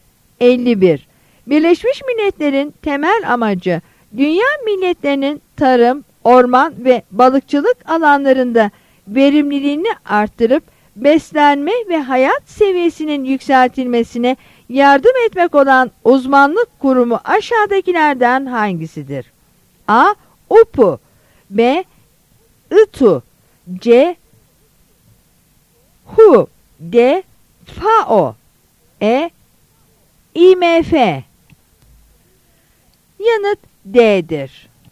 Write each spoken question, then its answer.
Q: Birleşmiş Milletler'in temel amacı dünya milletlerinin tarım, orman ve balıkçılık alanlarında verimliliğini arttırıp beslenme ve hayat seviyesinin yükseltilmesine yardım etmek olan uzmanlık kurumu aşağıdakilerden hangisidir?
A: Yanıt D'dir.